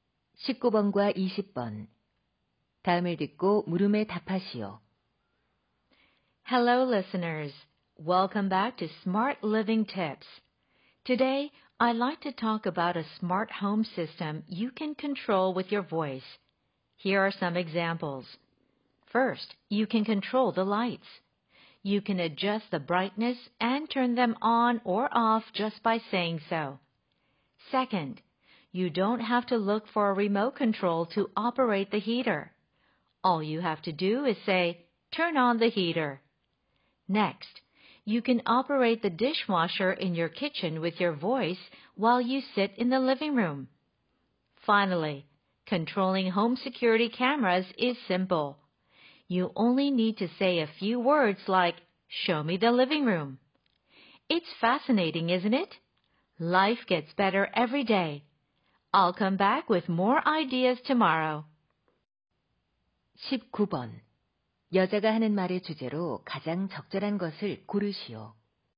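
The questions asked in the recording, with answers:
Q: 여자가 하는 말의 주제로 가장 적절한 것을 고르시오.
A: 음성으로 제어하는 스마트 홈 시스템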